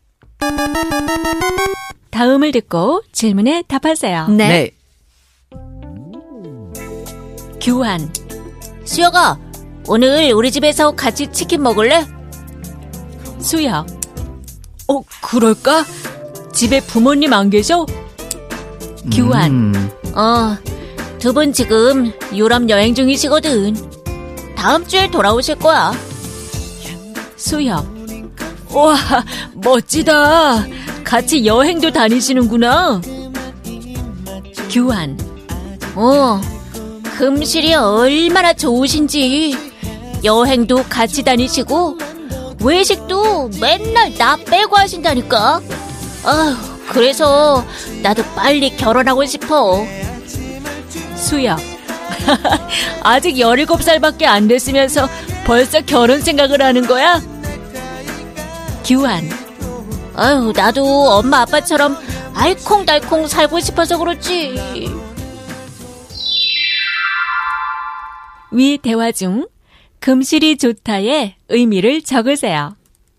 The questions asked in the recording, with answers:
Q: 위 대화 중 금실이 좋다의 의미를 적으세요.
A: It means that the relationship is good.